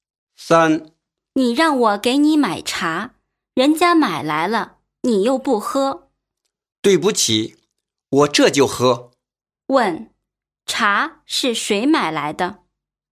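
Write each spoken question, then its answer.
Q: 茶是谁买来的?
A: 第一个说话的人(说"人家买来了"的人)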